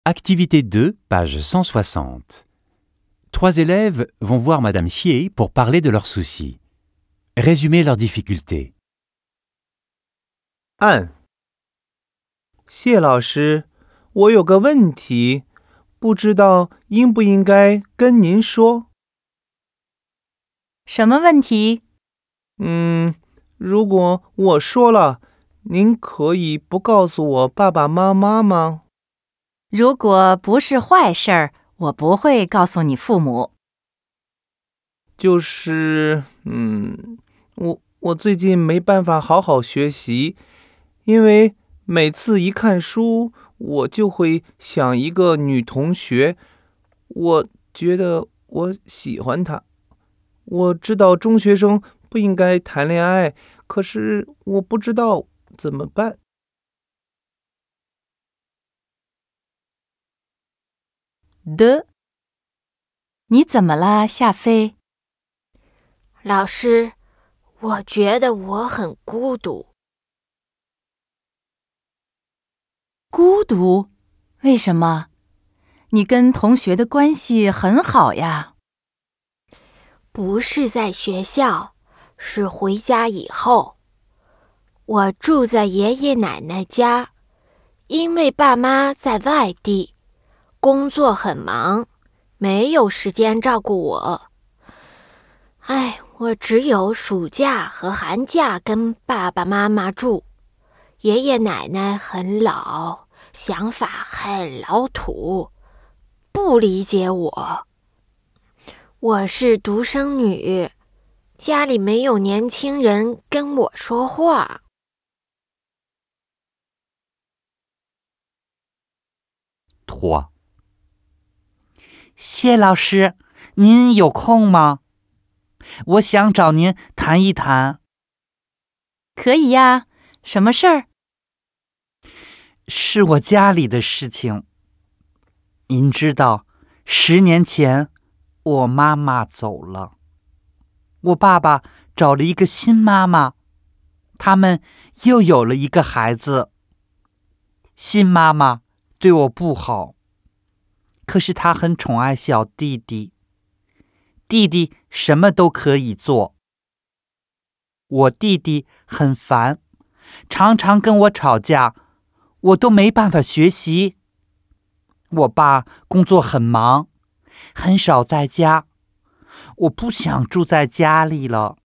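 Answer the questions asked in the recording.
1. Il n'arrive pas à étudier car il pense sans cesse à une camarade dont il est amoureux, et ne sait pas quoi faire.
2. Xia Fei se sent seule à la maison : elle vit chez ses grands-parents, qui ne la comprennent pas, car ses parents travaillent ailleurs ; fille unique, elle n'a aucun jeune à qui parler.
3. Sa belle-mère est méchante avec elle mais gâte son petit frère, qui se dispute souvent avec elle ; son père est rarement là, elle n'arrive pas à étudier et ne veut plus vivre à la maison.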